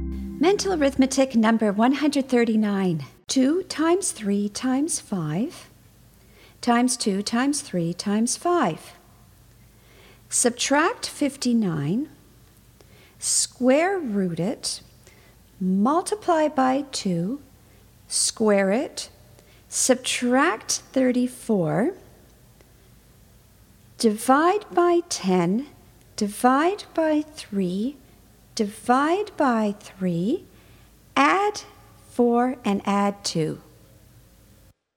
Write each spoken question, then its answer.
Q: 2 times 3 times 5 times 2 times 3 times 5. Subtract 59, square root it, multiply by 2, square it, subtract 34, divide by 10, divide by 3, divide by 3, add 4, and add 2.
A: And the answer is 43.